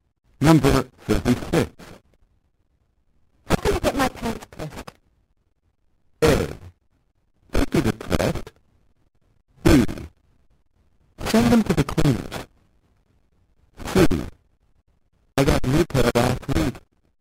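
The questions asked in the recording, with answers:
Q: How can I get my pants pressed?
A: B: Send them to the cleaners.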